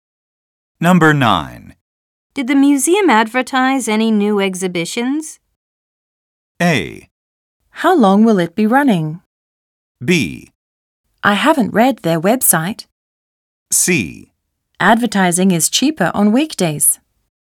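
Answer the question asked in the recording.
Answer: B: I haven't read their website.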